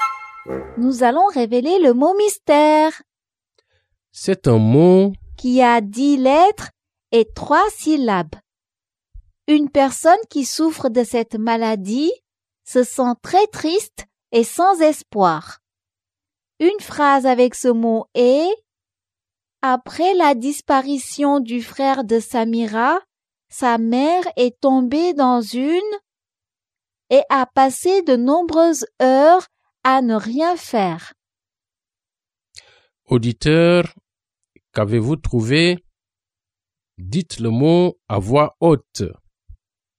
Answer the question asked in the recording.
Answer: Le mot mystère est dépression.